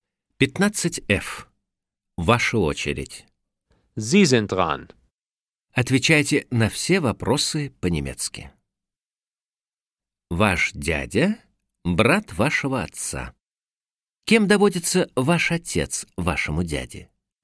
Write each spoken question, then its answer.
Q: Кем доводится ваш отец вашему дяде?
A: Er ist der Bruder meines Onkels.